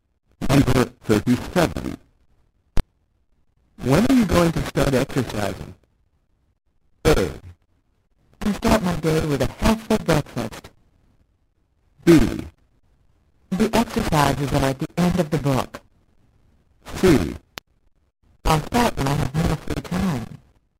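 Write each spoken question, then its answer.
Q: When are you going to start exercising?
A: C: I'll start when I have more free time.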